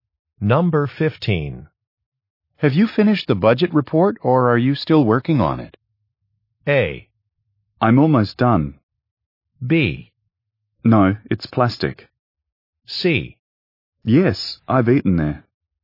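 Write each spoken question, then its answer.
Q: Have you finished the budget report or are you still working on it?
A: A: I'm almost done.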